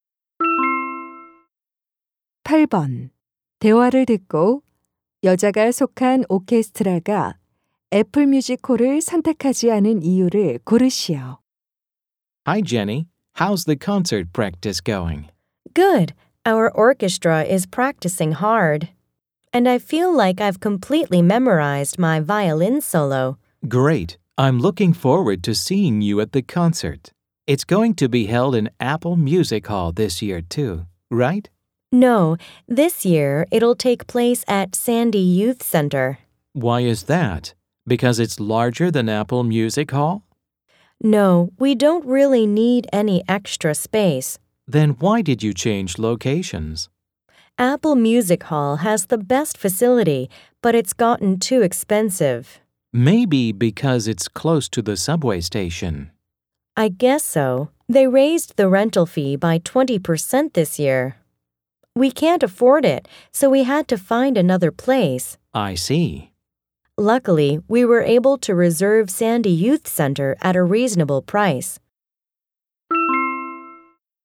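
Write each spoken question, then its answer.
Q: 대화를 듣고 여자가 속한 오케스트라가 애플 뮤직홀을 선택하지 않은 이유를 고르시오.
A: 대관료가 너무 올라서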